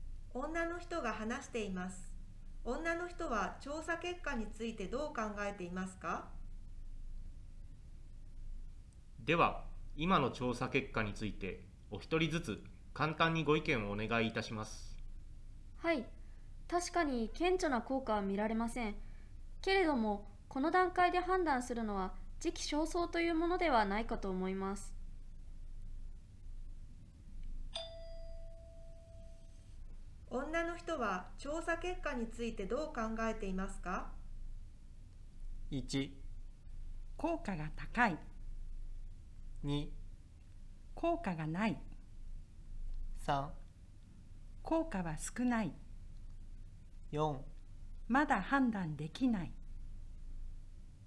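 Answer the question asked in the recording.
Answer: 4: まだ判断できない。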